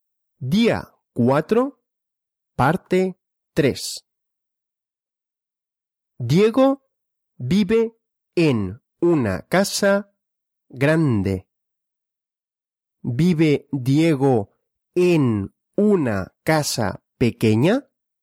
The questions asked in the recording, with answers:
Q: ¿Vive Diego en una casa pequeña?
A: No. Diego no vive en una casa pequeña.